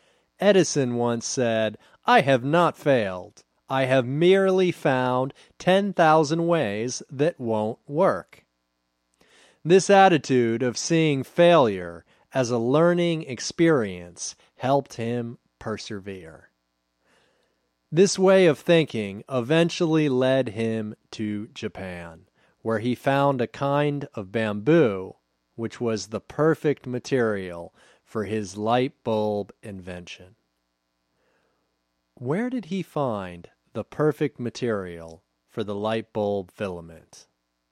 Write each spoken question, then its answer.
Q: Where did he find the perfect material for the light bulb filament?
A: He found the perfect material for the light bulb filament in Japan.